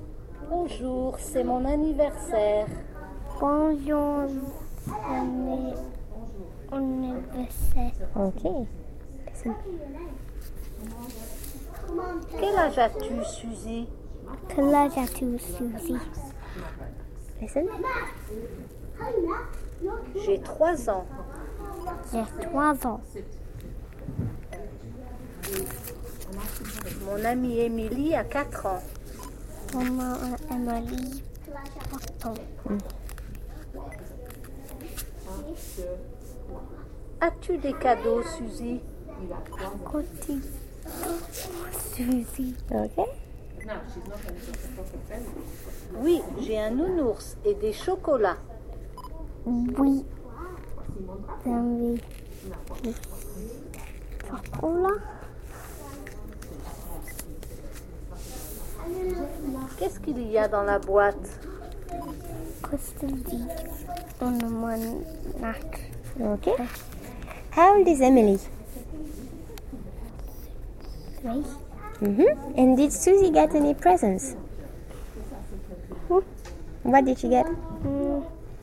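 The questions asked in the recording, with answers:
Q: And did Suzy get any presents?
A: Yes, a teddy bear and chocolates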